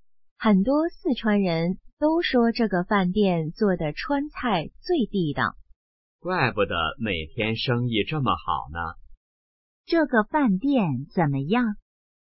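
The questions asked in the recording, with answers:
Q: 这个饭店怎么样?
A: 川菜很地道,生意很好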